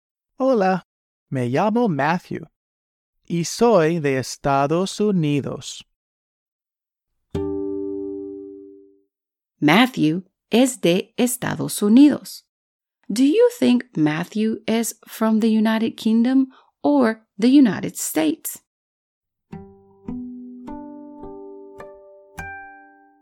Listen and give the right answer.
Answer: Muy bien. Matthew is from the United States